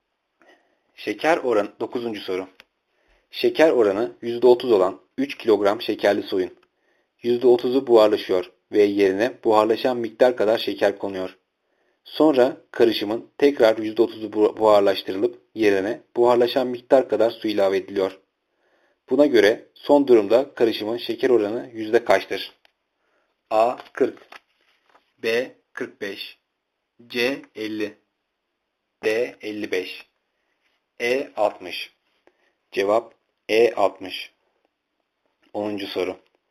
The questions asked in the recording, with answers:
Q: Buna göre son durumda karışımın şeker oranı yüzde kaçtır?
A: Cevap E. 60.